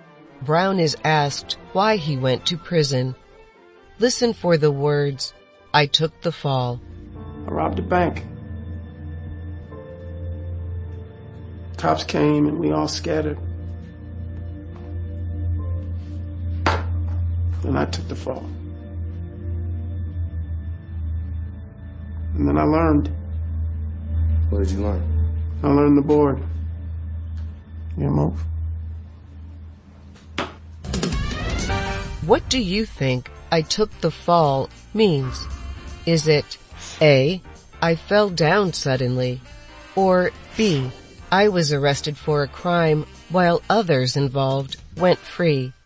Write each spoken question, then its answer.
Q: What do you think I took the fall means? Is it A, I fell down suddenly, or B, I was arrested for a crime while others involved went free?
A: The answer is B.